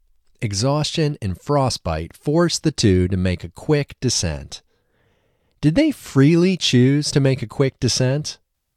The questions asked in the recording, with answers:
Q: Did they freely choose to make a quick descent?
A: No, they didn't freely choose to make a quick descent.